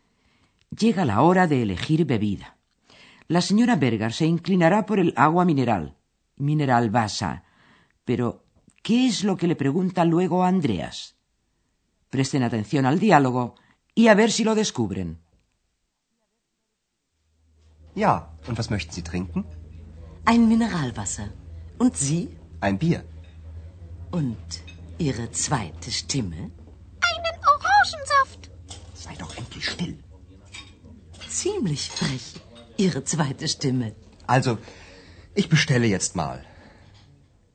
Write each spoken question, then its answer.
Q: Pero, ¿qué es lo que le pregunta luego a Andreas?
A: la señora Berger no deja escapar la oportunidad de preguntarle qué va a beber su segunda voz.